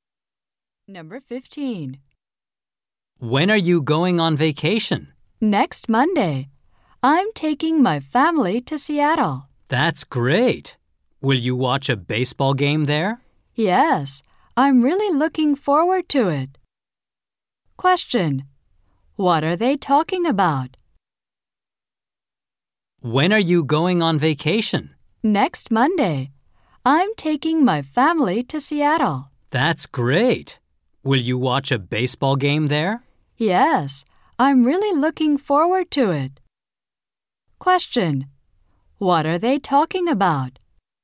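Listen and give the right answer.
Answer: A vacation trip to Seattle.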